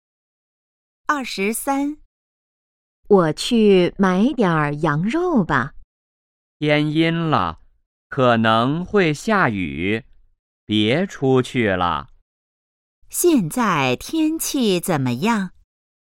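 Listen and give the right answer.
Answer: 天阴了,可能会下雨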